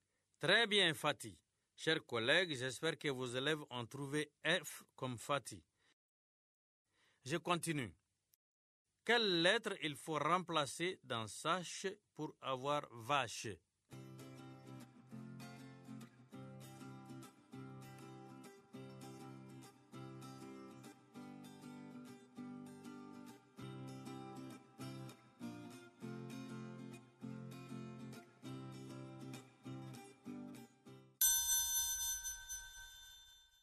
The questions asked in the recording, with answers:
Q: quelle lettre il faut remplacer dans sache pour avoir vache?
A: Monsieur, c'est la lettre S.